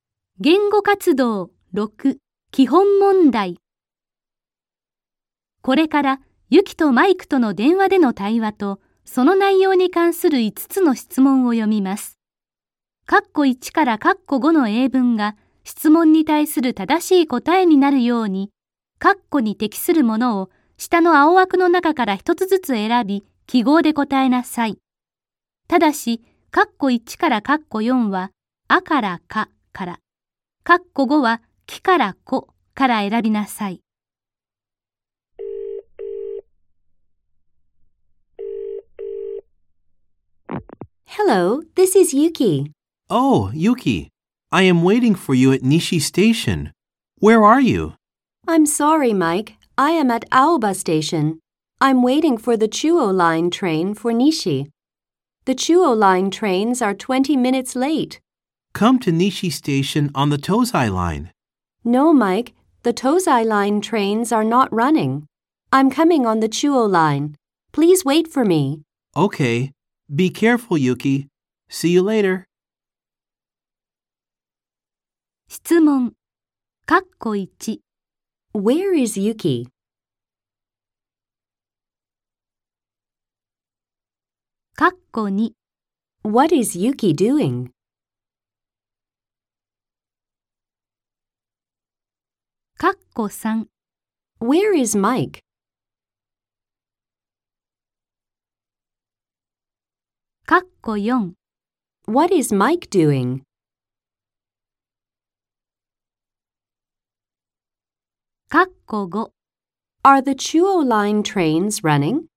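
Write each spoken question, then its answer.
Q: Where is Yuki?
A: At Aoba Station.

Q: What is Yuki doing?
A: She is waiting for the Chuo Line train for Nishi.

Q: Where is Mike?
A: At Nishi Station.

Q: What is Mike doing?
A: He is waiting for Yuki.

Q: Are the Chuo Line trains running?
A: Yes, they are (but 20 minutes late).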